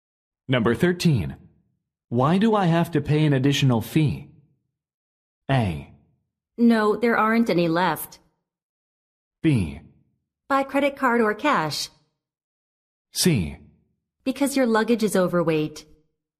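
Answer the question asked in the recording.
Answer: C: Because your luggage is overweight.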